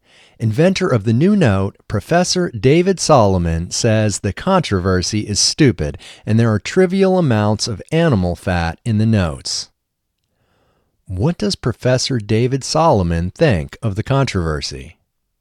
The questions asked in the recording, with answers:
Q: What does Professor David Solomon think of the controversy?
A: Professor David Solomon thinks the controversy is stupid.